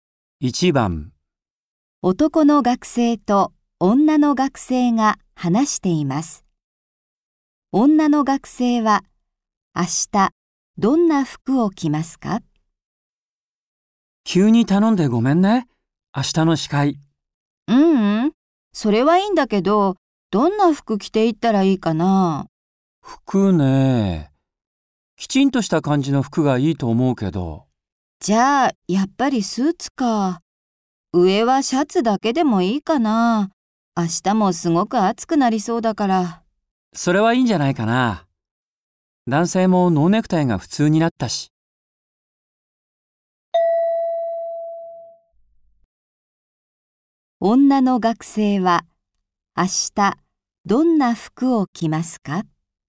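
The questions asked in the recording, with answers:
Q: 女の学生は明日どんな服を着ますか?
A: スーツ(上着は着ないで、上はシャツだけ)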